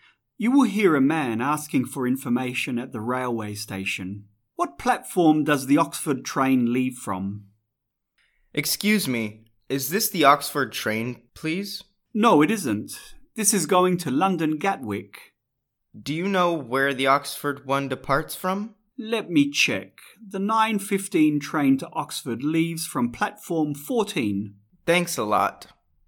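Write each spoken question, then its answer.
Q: What platform does the Oxford train leave from?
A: Platform 14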